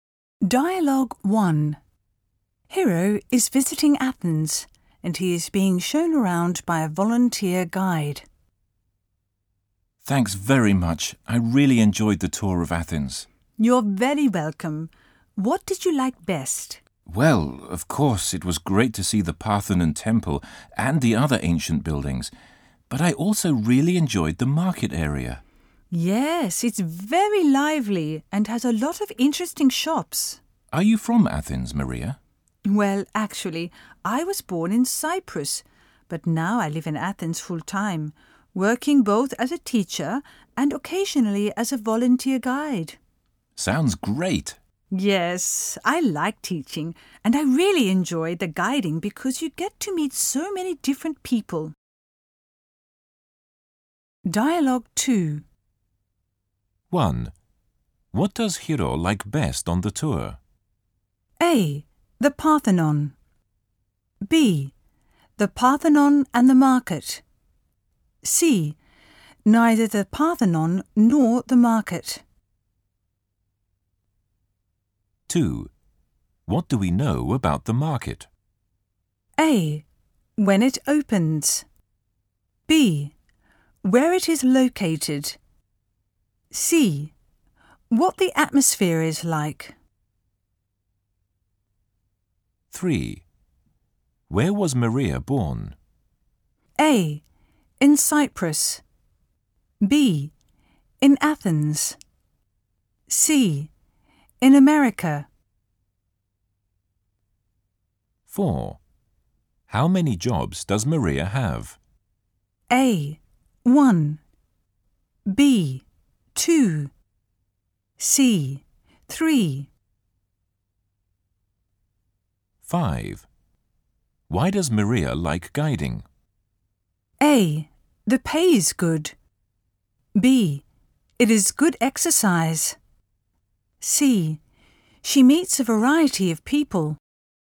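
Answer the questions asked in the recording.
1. B: The Parthenon and the market.
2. C: What the atmosphere is like.
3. A: In Cyprus.
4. B: 2.
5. C: She meets a variety of people.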